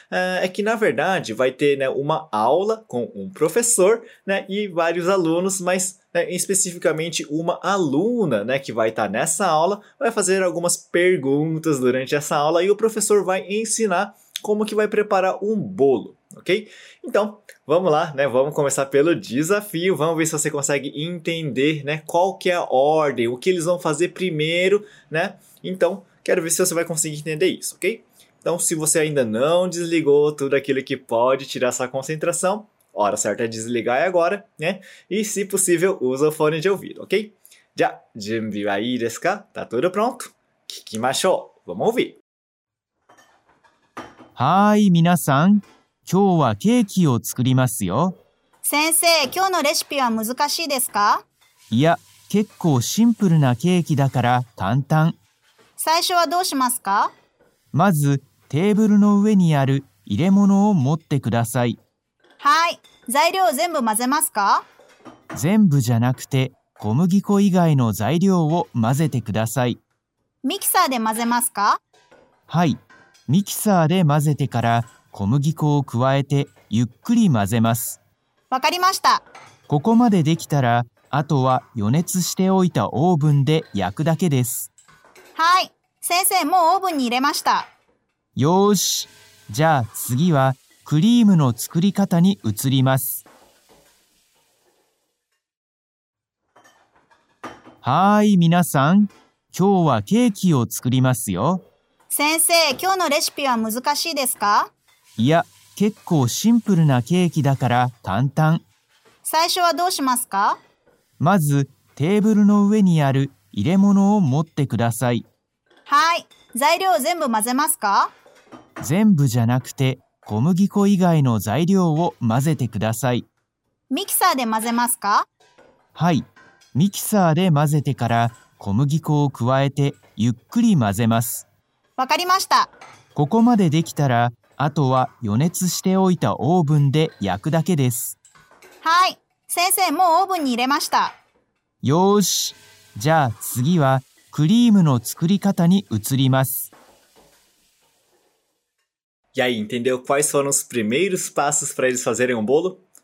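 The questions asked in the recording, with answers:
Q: Vamos ver se você consegue entender, né, qual que é a ordem, o que eles vão fazer primeiro, né?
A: Primeiro pegam a vasilha que está em cima da mesa; depois misturam na batedeira todos os ingredientes, menos a farinha; em seguida acrescentam a farinha e misturam devagar; por fim assam no forno pré-aquecido (e depois fazem o creme).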